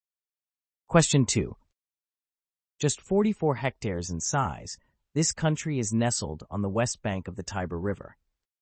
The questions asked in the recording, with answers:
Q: Just 44 hectares in size, this country is nestled on the west bank of the Tiber River.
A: The answer is Vatican City.